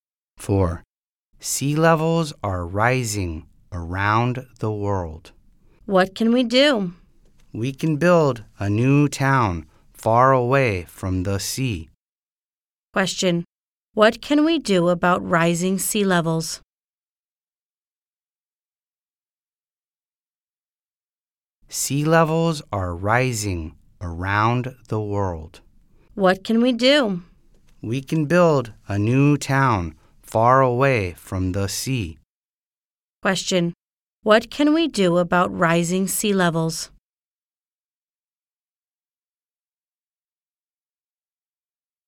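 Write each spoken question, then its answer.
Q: What can we do about rising sea levels?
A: Build a new town far away from the sea.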